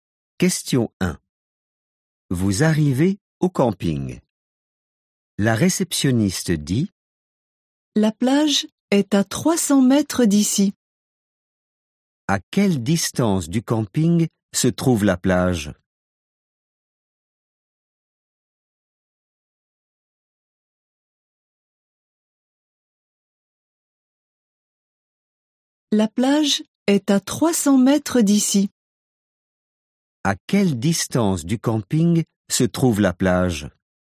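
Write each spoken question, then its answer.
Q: À quelle distance du camping se trouve la plage ?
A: 300 mètres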